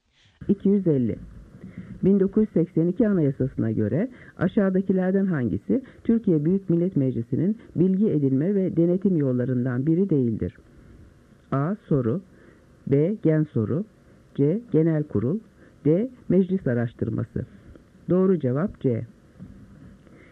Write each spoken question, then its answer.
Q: 1982 Anayasası'na göre aşağıdakilerden hangisi Türkiye Büyük Millet Meclisi'nin bilgi edinme ve denetim yollarından biri değildir?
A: Doğru cevap C.